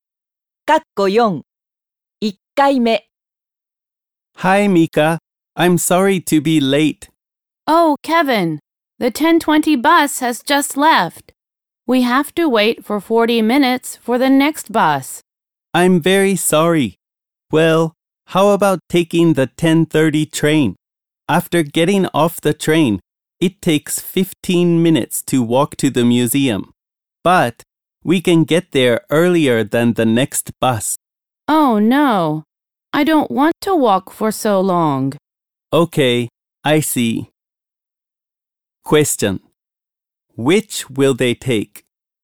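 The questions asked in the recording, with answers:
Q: Which will they take?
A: The next bus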